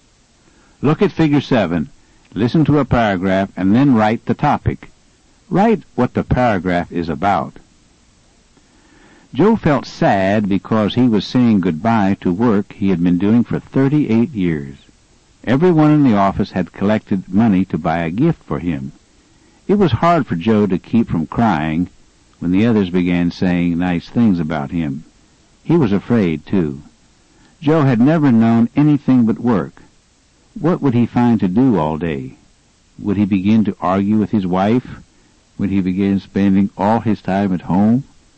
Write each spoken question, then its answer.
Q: Write what the paragraph is about.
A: Your answer should be something like Joe's unhappy retirement.